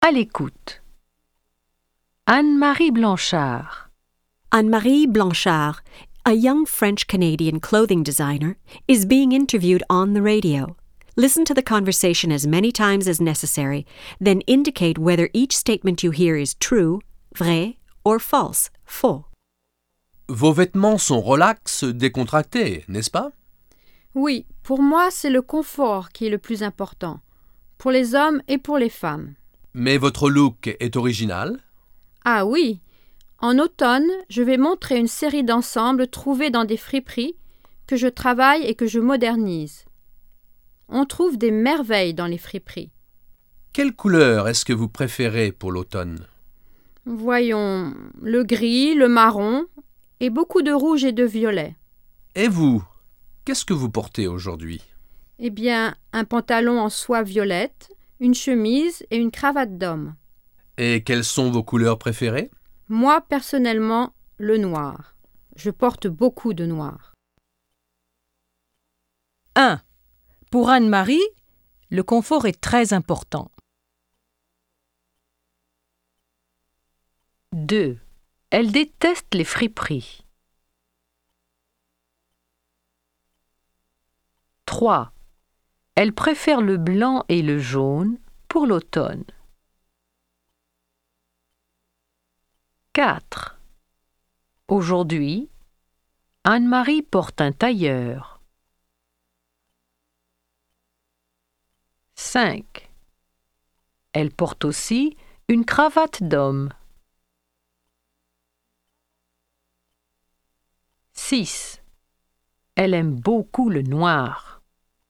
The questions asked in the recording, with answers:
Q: Pour Anne-Marie, le confort est très important.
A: 1. Vrai.

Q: Elle déteste les friperies.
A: 2. Faux.

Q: Elle préfère le blanc et le jaune pour l'automne.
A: 3. Faux.

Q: Aujourd'hui, Anne-Marie porte un tailleur.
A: 4. Faux.

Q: Elle porte aussi une cravate d'homme.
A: 5. Vrai.

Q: Elle aime beaucoup le noir.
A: 6. Vrai.